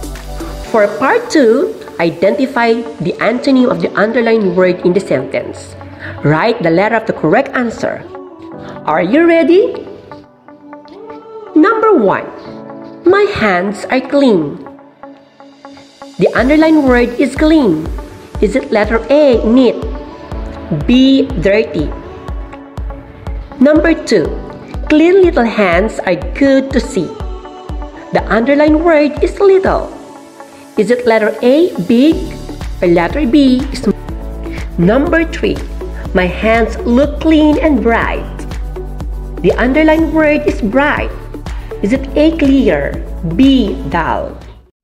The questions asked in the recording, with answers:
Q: Is it letter A, neat, B, dirty?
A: It's letter B, dirty.

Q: Is it letter A, big, or letter B, small?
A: It's letter A, big.

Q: Is it A, clear, B, dull?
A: It's letter B, dull.